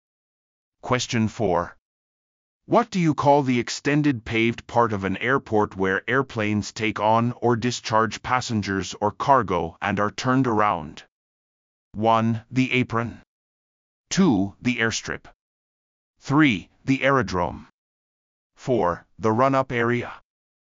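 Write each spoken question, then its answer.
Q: What do you call the extended paved part of an airport where airplanes take on or discharge passengers or cargo and are turned around?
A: 1: The apron.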